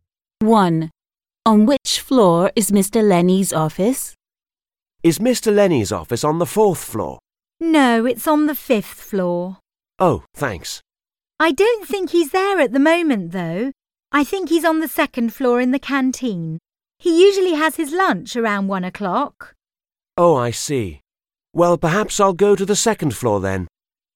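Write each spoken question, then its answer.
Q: On which floor is Mr. Lenny's office?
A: the fifth floor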